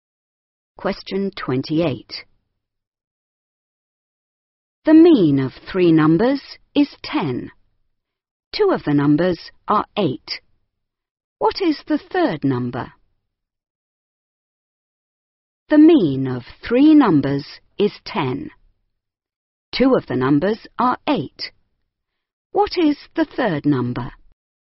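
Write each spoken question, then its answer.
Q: What is the third number?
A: 14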